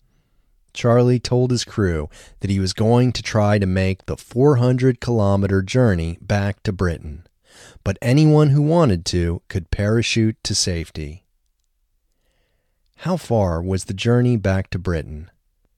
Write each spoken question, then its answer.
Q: How far was the journey back to Britain?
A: The journey back to Britain was 400 kilometers.